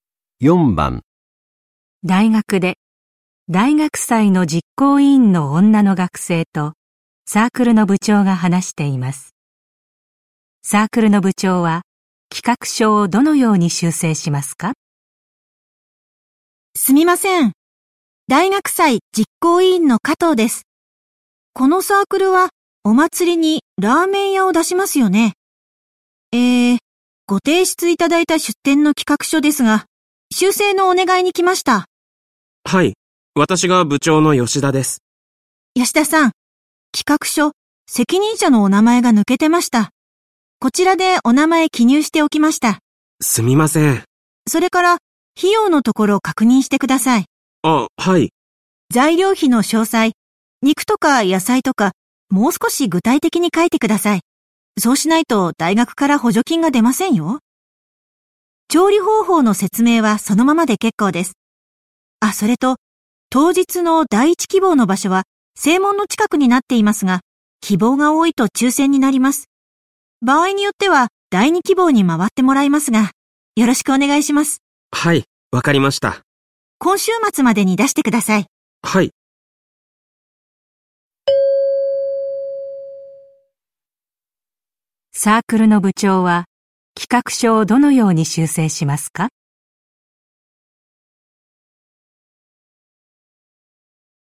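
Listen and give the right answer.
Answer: 材料費の詳細(肉や野菜など)をもっと具体的に書く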